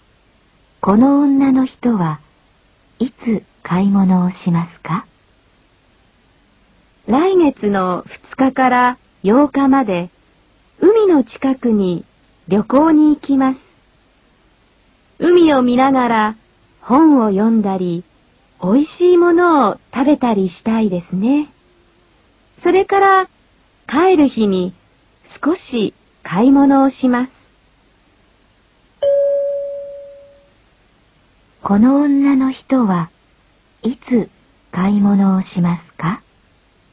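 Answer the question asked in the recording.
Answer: 8日(帰る日)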